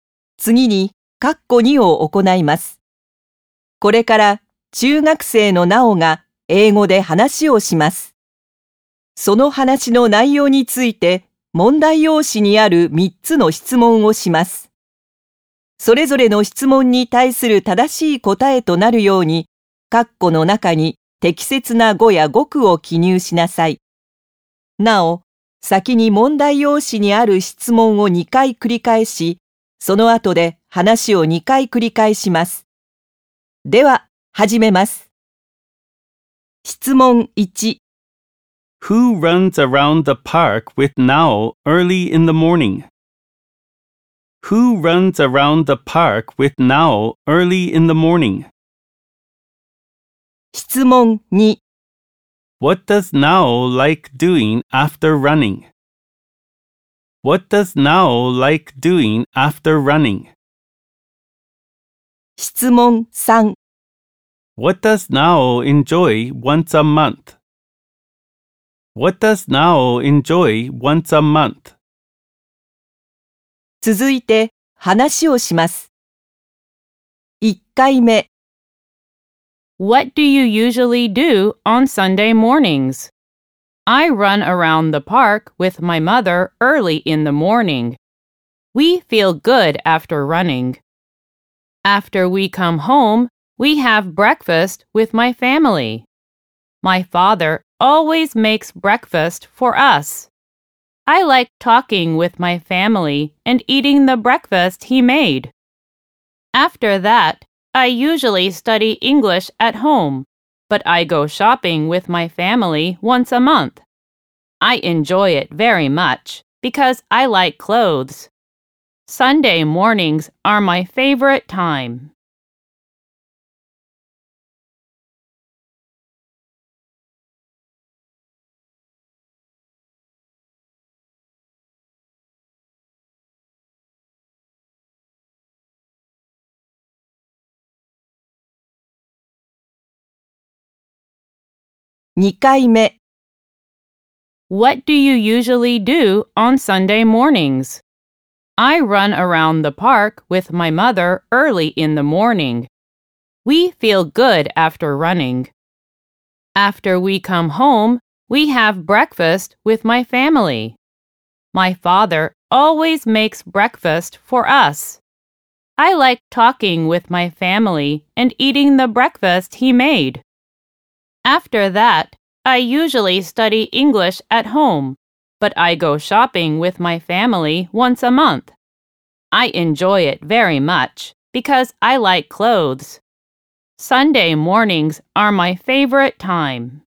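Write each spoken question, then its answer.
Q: Who runs around the park with Nao early in the morning?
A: Her mother

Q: What does Nao like doing after running?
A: Talking with her family and eating the breakfast her father made

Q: What does Nao enjoy once a month?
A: Going shopping with her family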